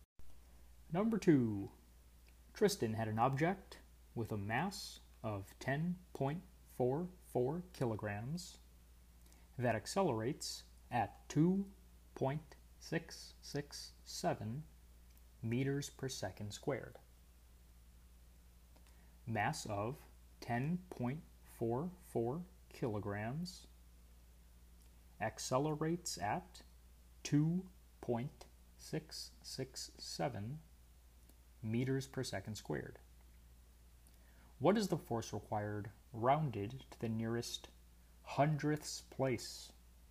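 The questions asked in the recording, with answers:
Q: What is the force required rounded to the nearest hundredths place?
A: 27.84 N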